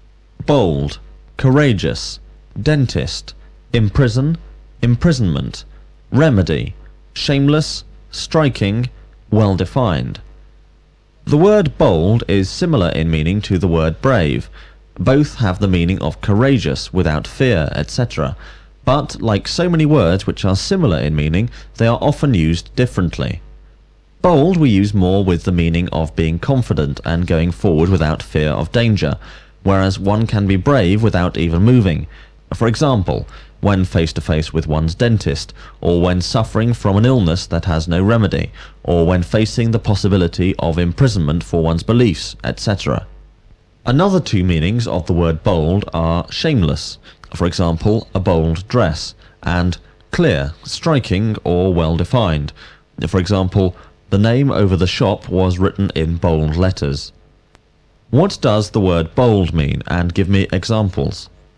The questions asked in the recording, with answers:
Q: What does the word bold mean, and give me examples?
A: The word bold means being confident and going forward without fear of danger.